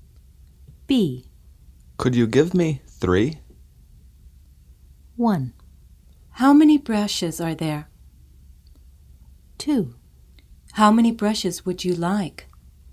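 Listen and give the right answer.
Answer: 2: How many brushes would you like?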